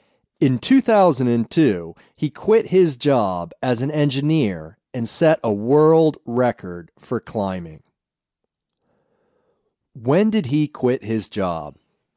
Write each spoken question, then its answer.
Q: When did he quit his job?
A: He quit his job in 2002.